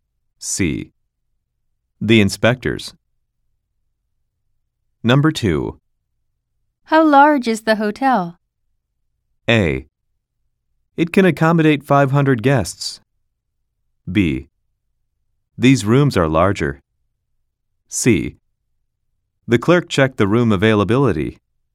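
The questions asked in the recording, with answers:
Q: How large is the hotel?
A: A: It can accommodate 500 guests.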